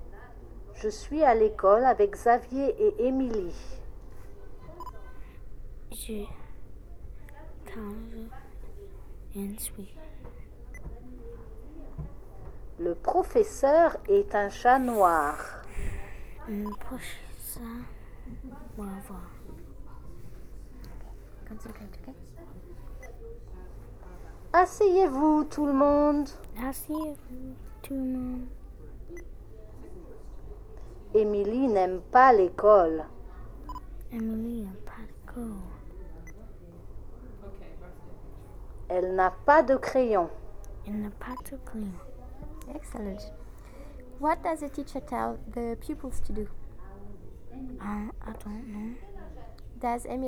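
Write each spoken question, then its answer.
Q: What does the teacher tell the pupils to do?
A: Sit down

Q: Does Émilie like school?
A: No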